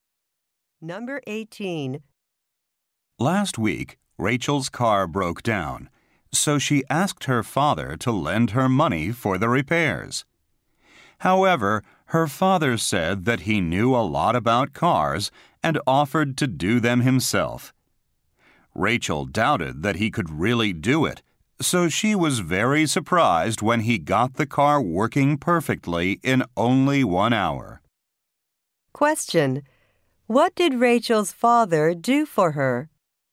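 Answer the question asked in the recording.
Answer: He repaired her car.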